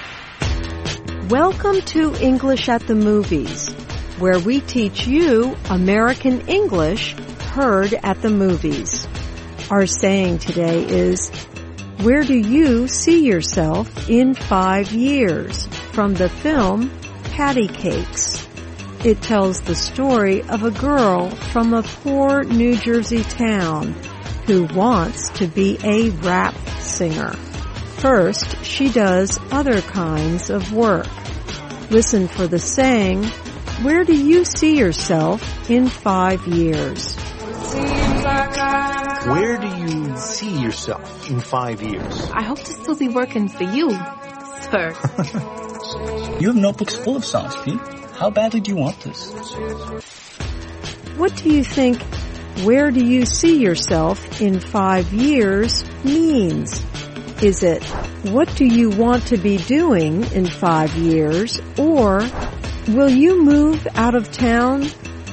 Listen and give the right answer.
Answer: Where do you see yourself in 5 years means, what do you want to be doing in 5 years?